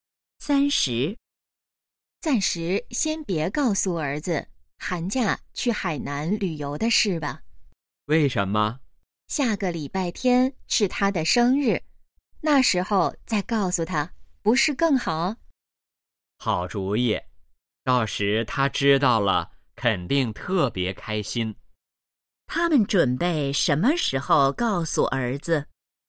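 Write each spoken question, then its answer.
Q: 他们准备什么时候告诉儿子?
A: 下个礼拜天(儿子生日时)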